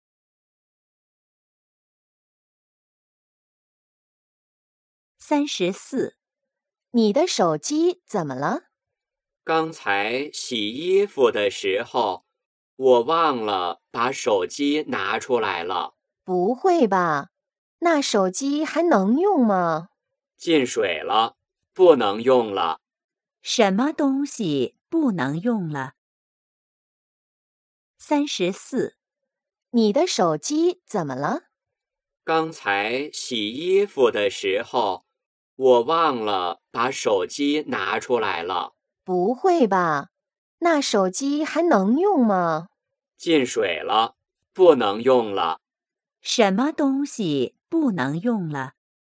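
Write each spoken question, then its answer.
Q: 什么东西不能用了?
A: 手机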